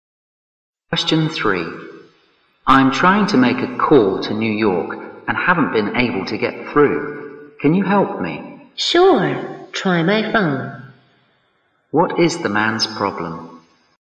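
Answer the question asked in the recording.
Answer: He can't get through to New York on the phone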